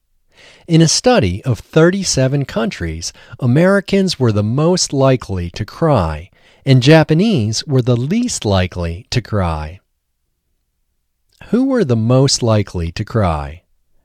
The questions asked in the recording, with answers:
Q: Who were the most likely to cry?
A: Americans were the most likely to cry.